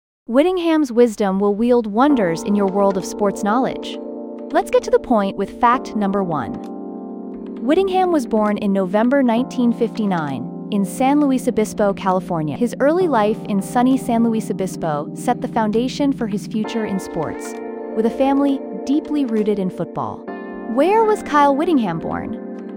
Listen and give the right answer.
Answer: Correct answer, San Luis Obispo, California.